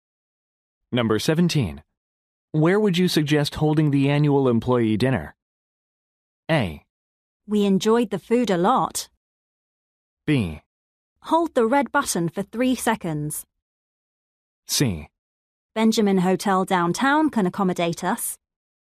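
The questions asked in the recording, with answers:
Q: Where would you suggest holding the annual employee dinner?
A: C: Benjamin Hotel downtown can accommodate us.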